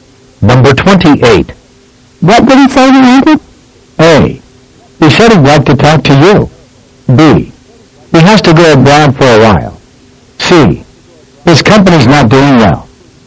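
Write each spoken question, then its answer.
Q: What did he say he wanted?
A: A: He said he'd like to talk to you.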